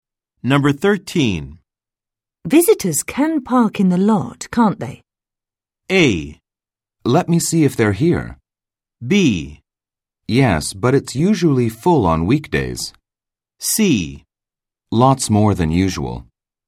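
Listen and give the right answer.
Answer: B: Yes, but it's usually full on weekdays.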